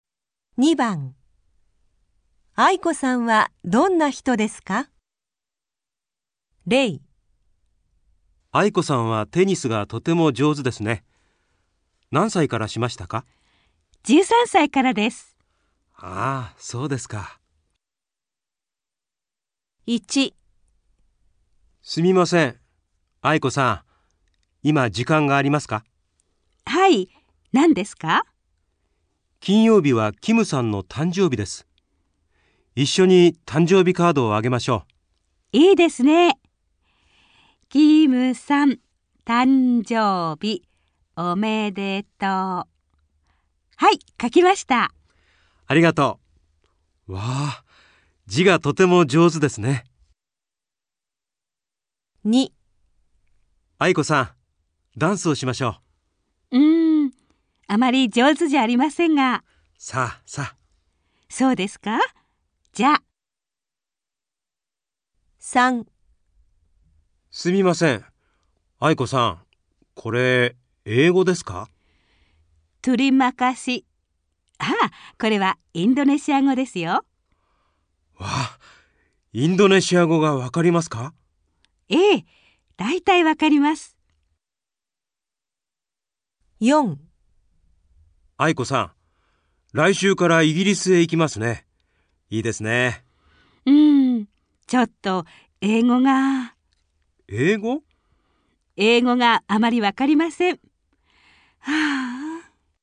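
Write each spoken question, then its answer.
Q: 愛子さんはどんな人ですか?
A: 字がとても上手な人

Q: 愛子さんはどんな人ですか?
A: ダンスがあまり上手じゃない人

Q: 愛子さんはどんな人ですか?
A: インドネシア語がだいたいわかる人

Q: 愛子さんはどんな人ですか?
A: 英語があまりわからない人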